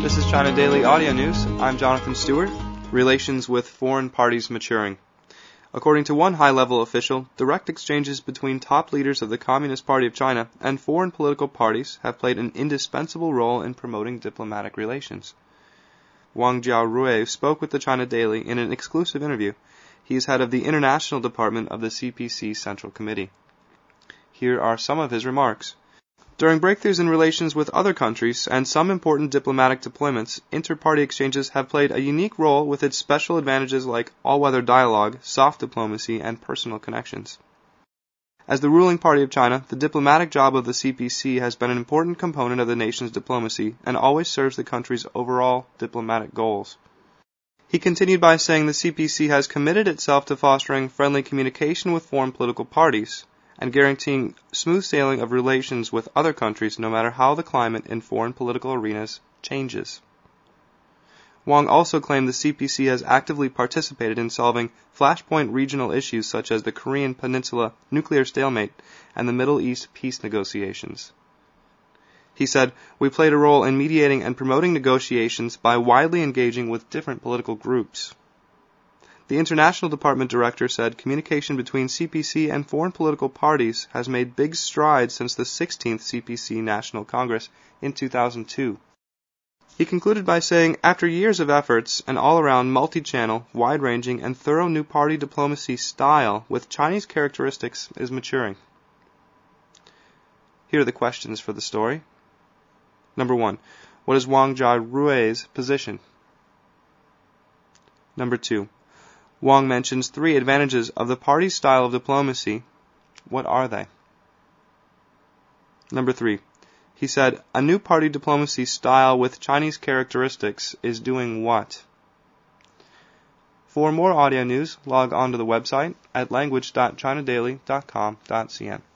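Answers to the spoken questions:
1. Head of the International Department of the CPC Central Committee
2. All-weather dialogue, soft diplomacy, and personal connections
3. Maturing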